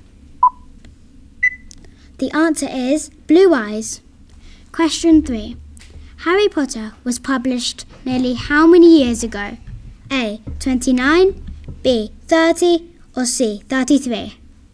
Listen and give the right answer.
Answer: The answer is A.